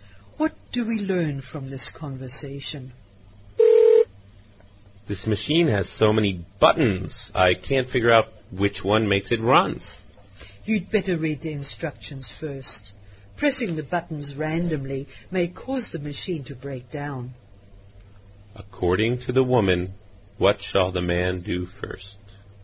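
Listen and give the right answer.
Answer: Read the instructions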